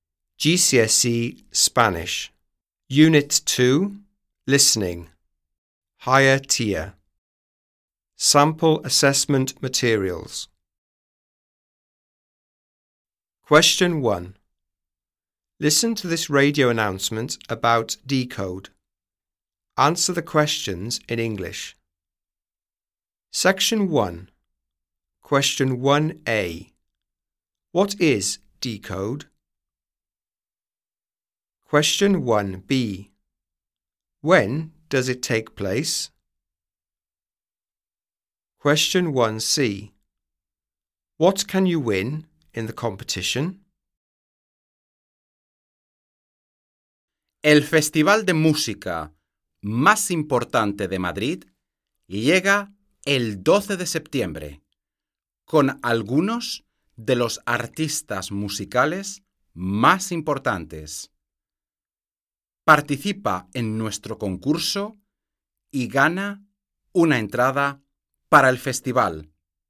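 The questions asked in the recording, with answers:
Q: What is Decode?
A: The most important music festival in Madrid

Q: When does it take place?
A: 12th September

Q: What can you win in the competition?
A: A ticket for the festival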